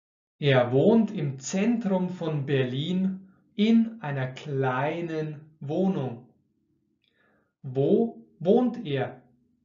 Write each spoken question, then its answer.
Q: Wo wohnt er?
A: Im Zentrum von Berlin. Er wohnt im Zentrum von Berlin.